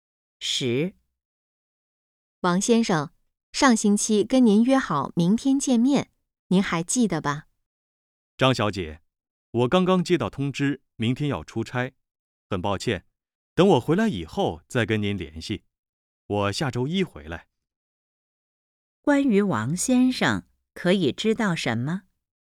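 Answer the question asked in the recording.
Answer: 明天要出差,不能见面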